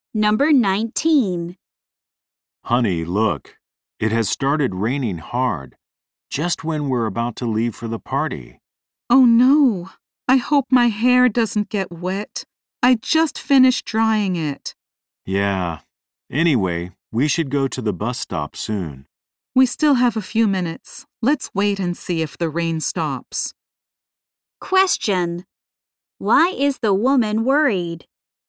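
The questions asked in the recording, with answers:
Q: Why is the woman worried?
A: Her hair might get wet in the rain.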